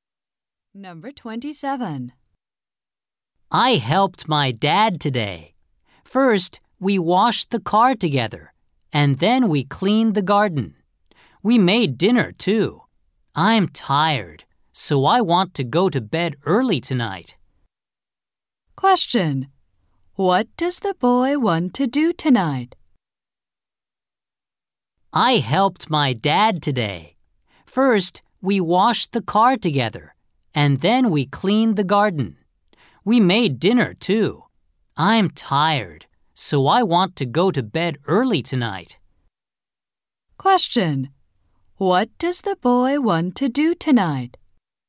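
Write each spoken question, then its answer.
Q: What does the boy want to do tonight?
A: Go to bed early.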